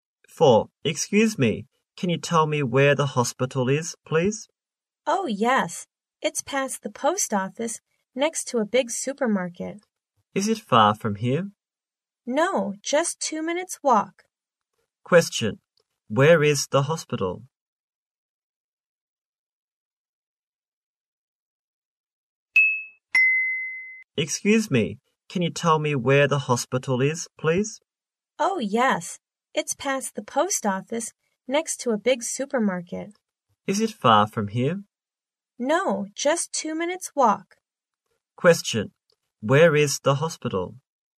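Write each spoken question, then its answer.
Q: Where is the hospital?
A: Past the post office, next to a big supermarket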